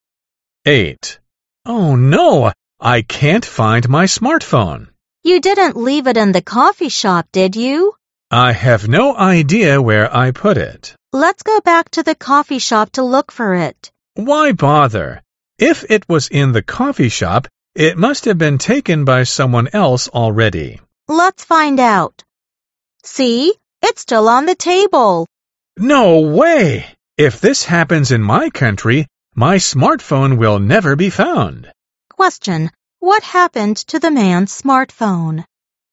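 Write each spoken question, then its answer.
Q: What happened to the man's smartphone?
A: He left it in the coffee shop and it was still on the table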